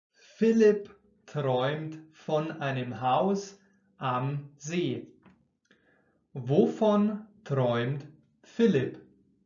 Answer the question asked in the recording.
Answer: Von einem Haus am See. Er träumt von einem Haus am See.